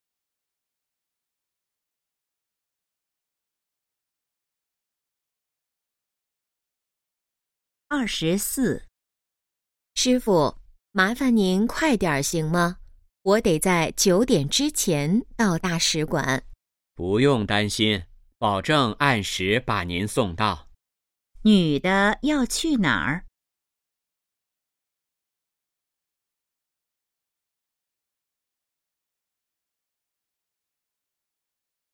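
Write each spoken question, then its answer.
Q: 女的要去哪儿?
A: 大使馆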